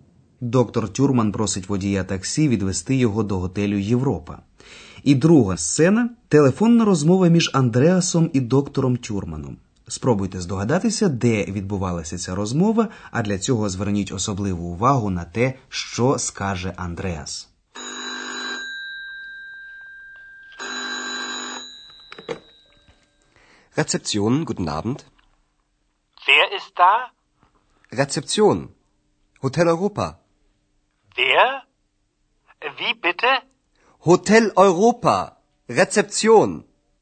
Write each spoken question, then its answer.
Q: Спробуйте здогадатися, де відбувалася ця розмова, а для цього зверніть особливу увагу на те, що скаже Андреас.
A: Сподіваємося, вам не важко було здогадатися, що доктор Тюрман дзвонив до рецепціон, бюро реєстрації вже знайомого вам готелю Європа